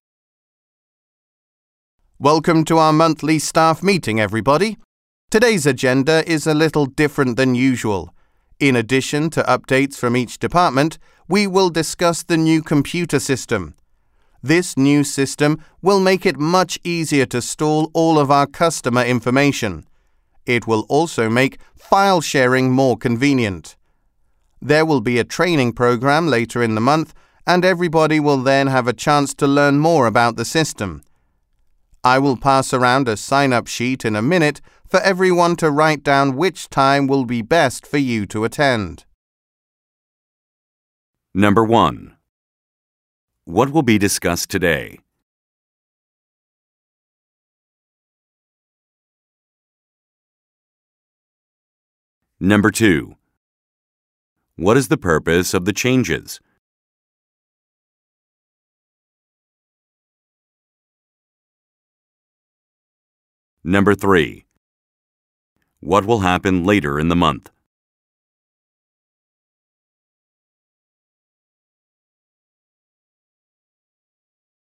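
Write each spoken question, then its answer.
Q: What will be discussed today?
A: Department updates and the new computer system

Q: What is the purpose of the changes?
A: To make storing customer information and file sharing easier

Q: What will happen later in the month?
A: A training program on the new system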